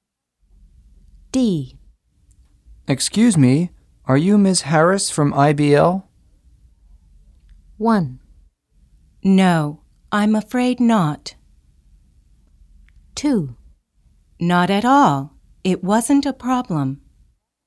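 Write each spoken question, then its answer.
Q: Excuse me, are you Ms. Harris from IBL?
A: 1: No, I'm afraid not.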